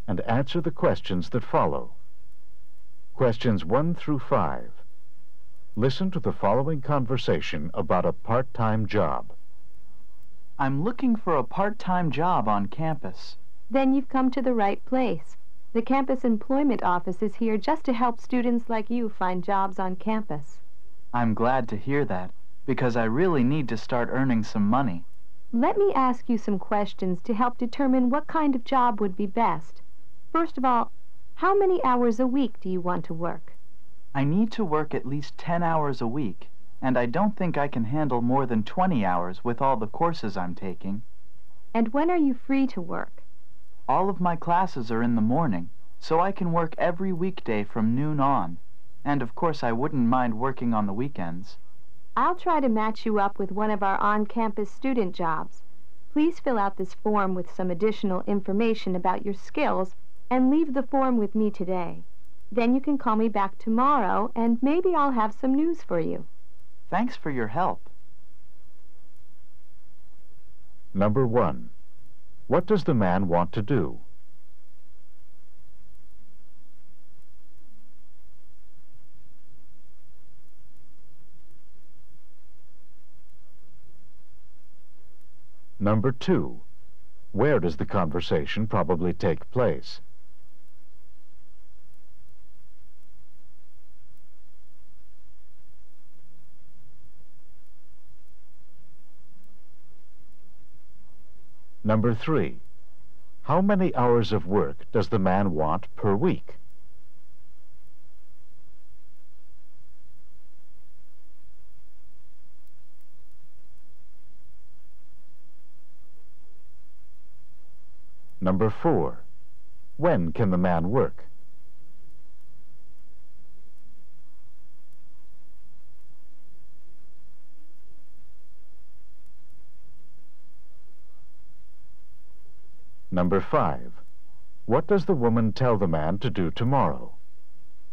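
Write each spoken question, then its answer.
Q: What does the man want to do?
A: Get a part-time job on campus.

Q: Where does the conversation probably take place?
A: In the campus employment office.

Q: How many hours of work does the man want per week?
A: 10 to 20 hours.

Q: When can the man work?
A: Weekday afternoons from noon on and weekends.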